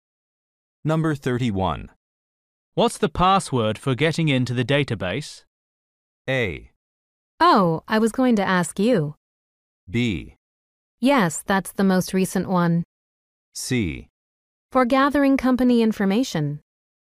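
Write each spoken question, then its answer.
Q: What's the password for getting into the database?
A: A: Oh, I was going to ask you.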